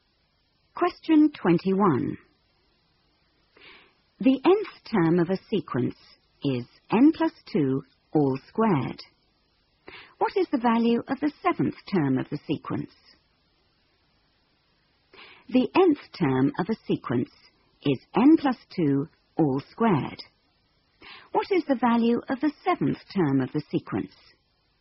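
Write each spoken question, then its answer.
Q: What is the value of the seventh term of the sequence?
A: 81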